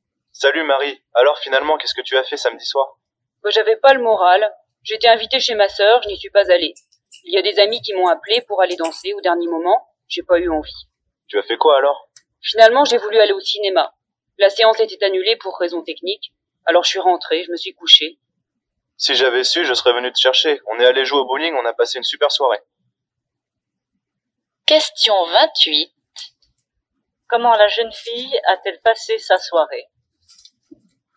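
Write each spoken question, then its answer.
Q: Comment la jeune fille a-t-elle passé sa soirée?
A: Elle est rentrée chez elle et s'est couchée.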